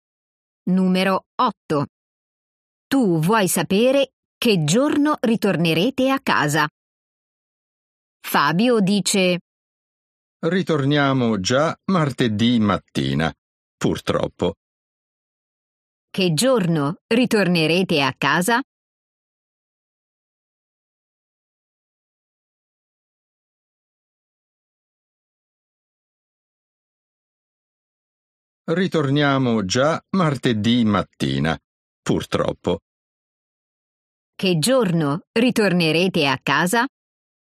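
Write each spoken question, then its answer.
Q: Che giorno ritornerete a casa?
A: Martedì mattina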